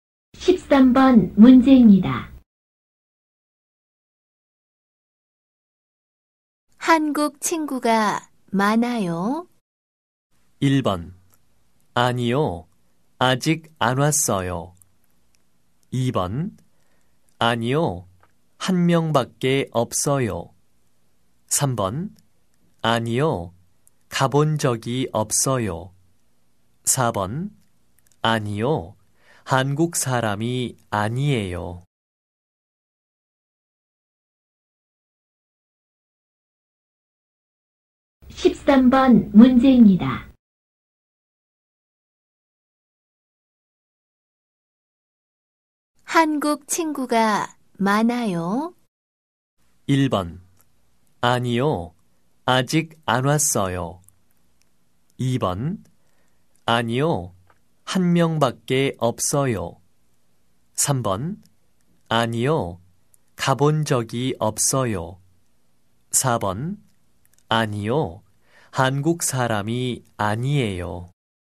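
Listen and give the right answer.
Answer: 2: 아니요, 한 명밖에 없어요.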